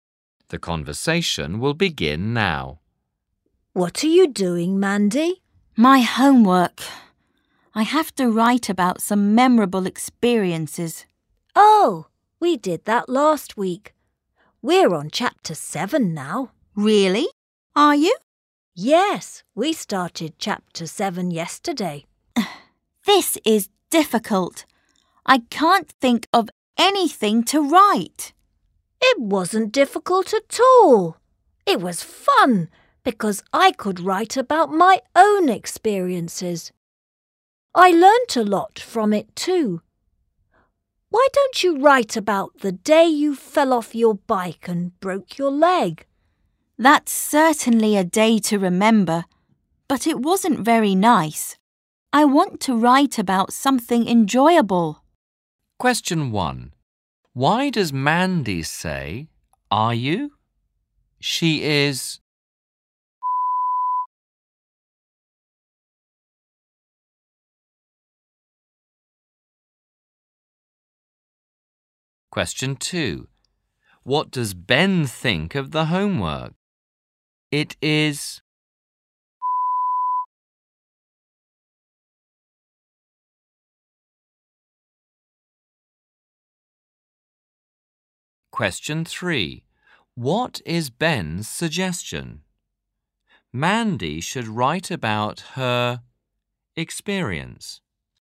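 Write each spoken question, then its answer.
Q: What does Ben think of the homework?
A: fun, not difficult

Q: What is Ben's suggestion?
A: Mandy should write about the day she fell off her bike and broke her leg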